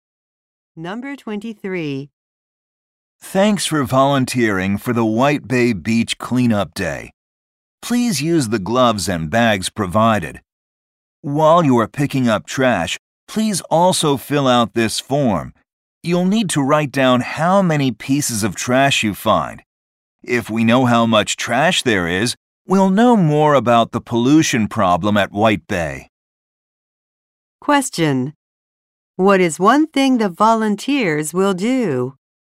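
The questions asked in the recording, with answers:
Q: What is one thing the volunteers will do?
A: Write down how many pieces of trash they find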